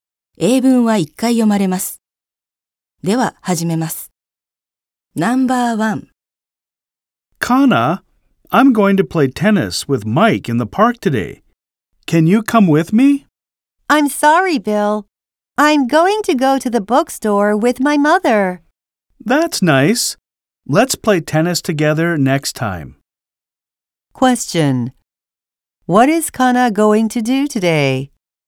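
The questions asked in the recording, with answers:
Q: What is Kana going to do today?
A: Go to the bookstore with her mother.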